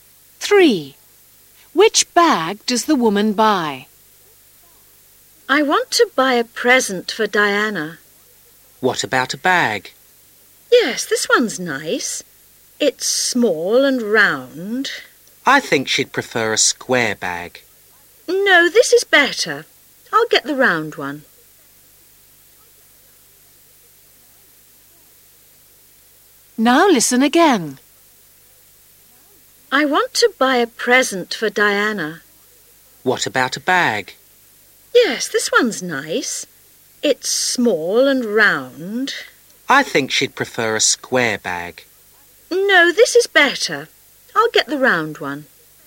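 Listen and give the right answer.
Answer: the small round one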